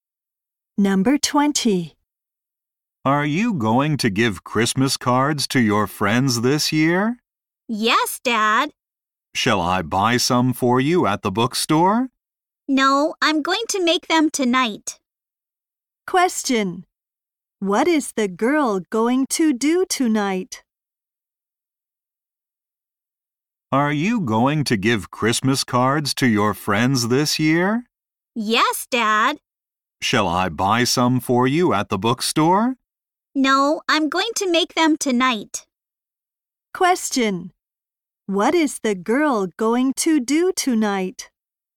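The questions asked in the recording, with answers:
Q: What is the girl going to do tonight?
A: Make Christmas cards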